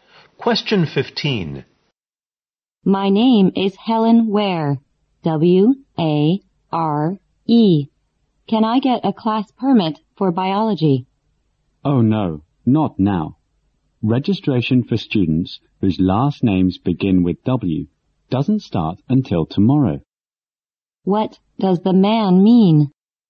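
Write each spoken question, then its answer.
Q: What does the man mean?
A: Helen must wait until tomorrow to register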